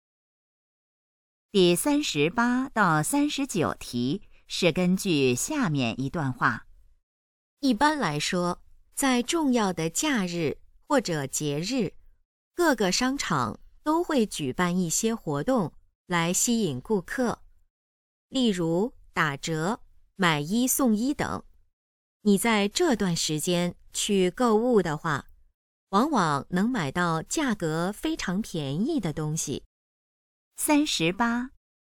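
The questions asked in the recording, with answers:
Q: 商场举办活动的目的是什么?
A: 吸引顾客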